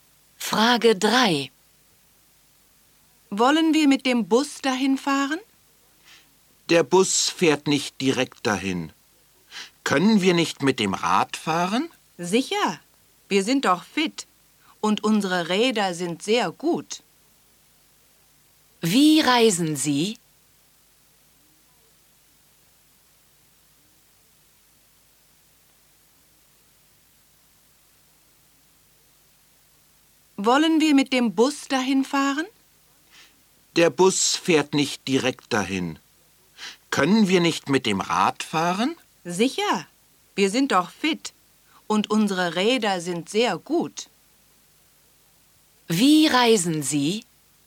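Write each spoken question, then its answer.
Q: Wie reisen Sie?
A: Mit dem Rad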